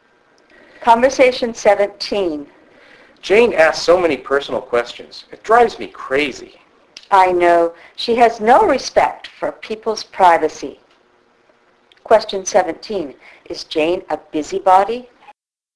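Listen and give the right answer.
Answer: Yes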